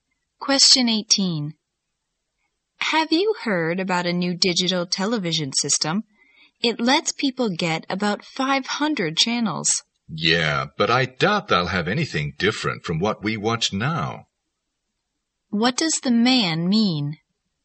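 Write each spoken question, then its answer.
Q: What does the man mean?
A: The new channels will offer nothing different from what they watch now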